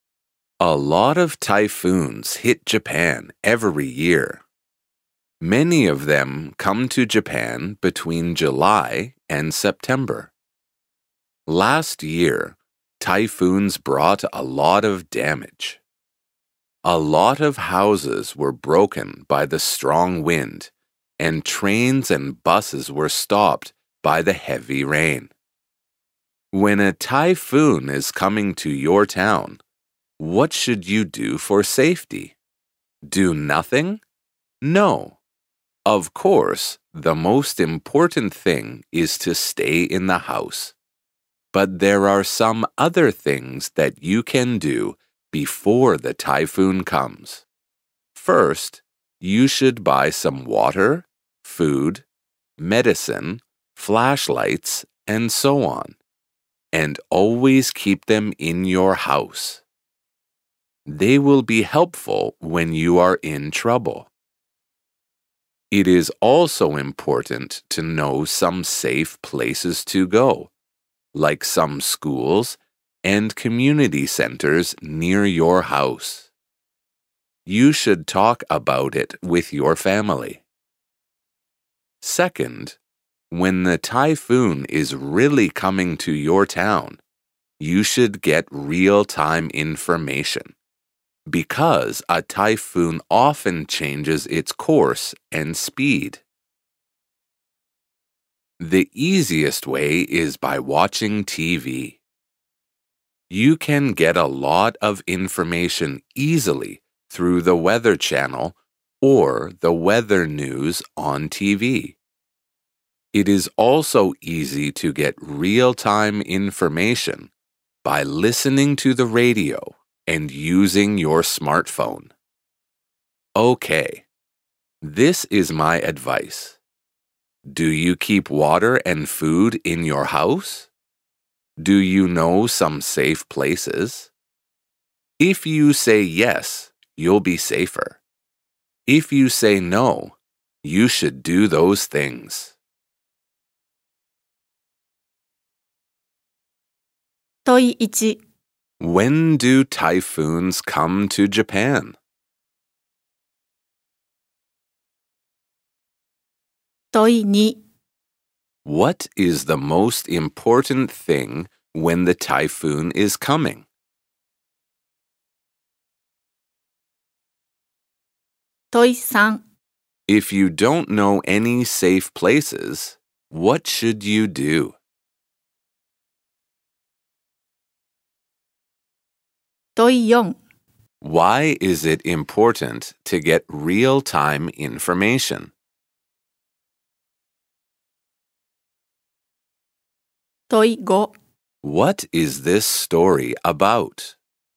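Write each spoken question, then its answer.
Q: When do typhoons come to Japan?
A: Mostly between July and September

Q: What is the most important thing when the typhoon is coming?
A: To stay in the house

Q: If you don't know any safe places, what should you do?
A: Find out about safe places like schools and community centers near your house and talk about them with your family

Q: Why is it important to get real-time information?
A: Because a typhoon often changes its course and speed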